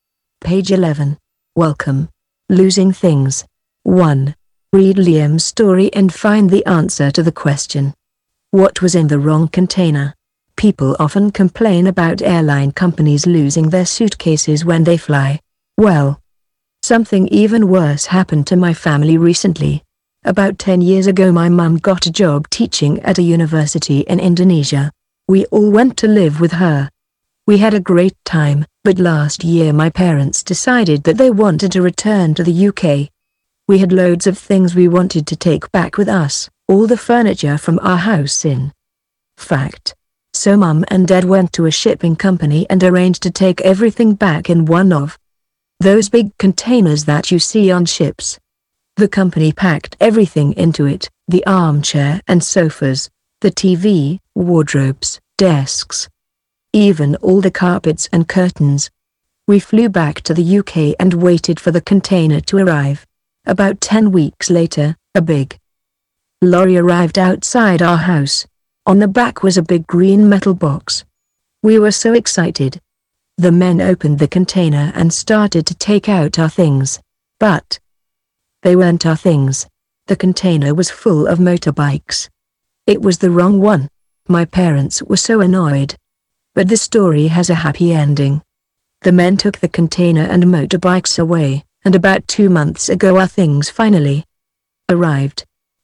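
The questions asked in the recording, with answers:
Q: What was in the wrong container?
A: motorbikes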